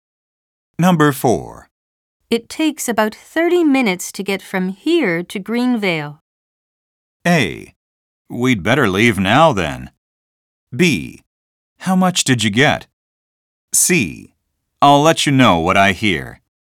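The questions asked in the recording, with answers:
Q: It takes about 30 minutes to get from here to Greenvale.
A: A: We'd better leave now then.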